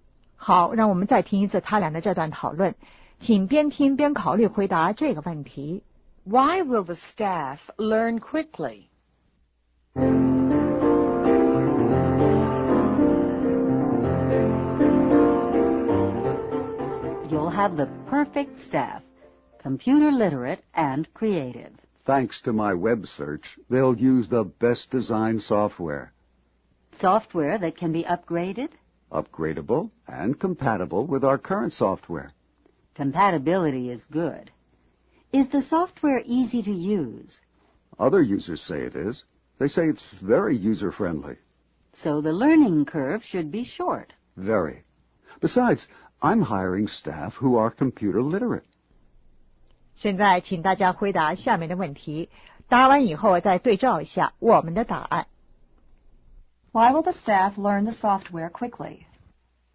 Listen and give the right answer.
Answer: They're computer literate and the software is user-friendly.